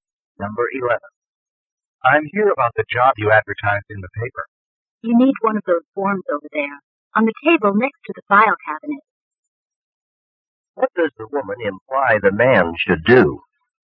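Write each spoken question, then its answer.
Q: What does the woman imply the man should do?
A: Fill out an application form from the table.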